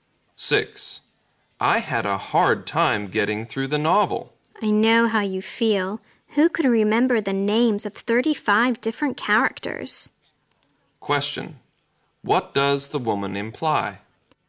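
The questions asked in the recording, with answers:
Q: Question. What does the woman imply?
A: The novel was hard to follow because it had too many characters.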